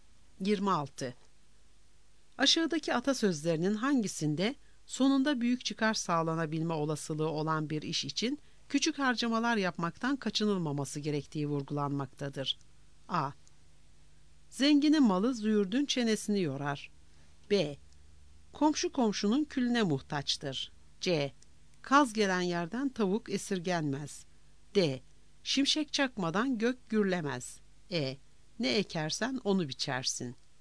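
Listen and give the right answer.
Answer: C: Kaz gelen yerden tavuk esirgenmez.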